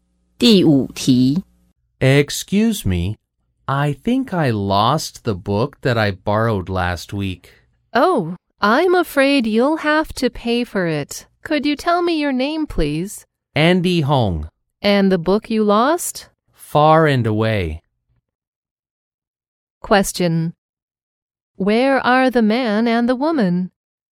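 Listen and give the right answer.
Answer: In a library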